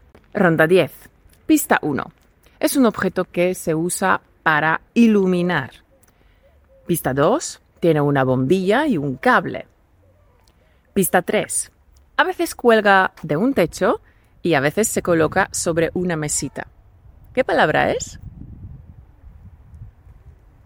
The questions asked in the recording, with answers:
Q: ¿Qué palabra es?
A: ¡Felicidades! La palabra es lámpara.